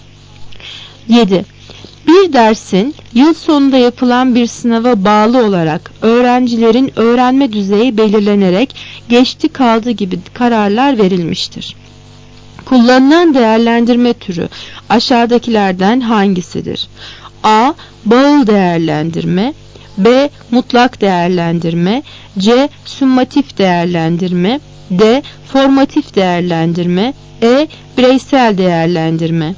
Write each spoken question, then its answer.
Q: Kullanılan değerlendirme türü aşağıdakilerden hangisidir?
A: Cevap C. Summatif değerlendirme.